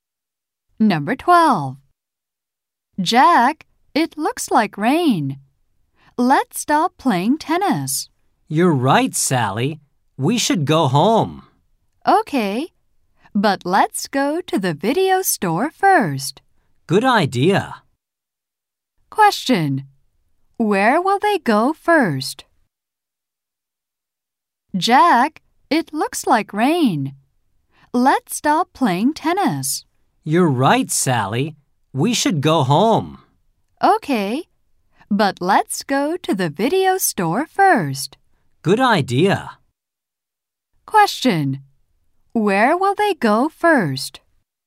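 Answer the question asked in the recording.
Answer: To the video store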